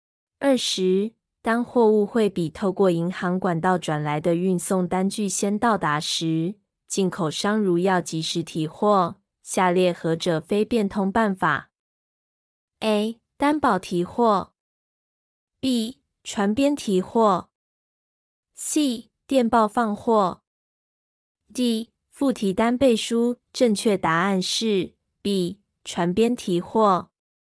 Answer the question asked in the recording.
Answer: 正确答案是 B. 船边提货。